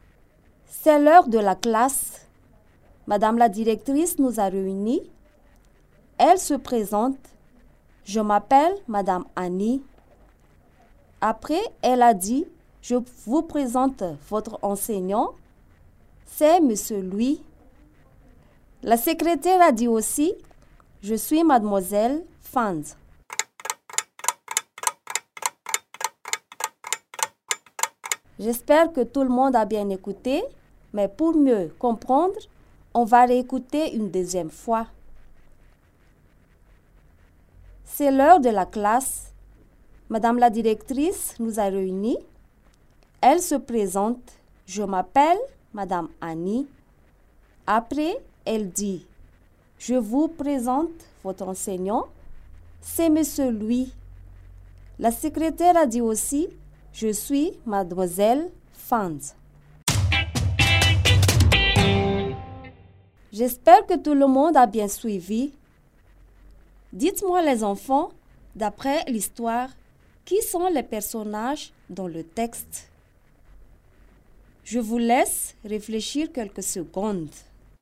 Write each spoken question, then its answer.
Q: Dites-moi les enfants, d'après l'histoire, qui sont les personnages dans le texte?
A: Les personnages sont Madame la directrice, les élèves, Monsieur Louis et Mademoiselle Fanz.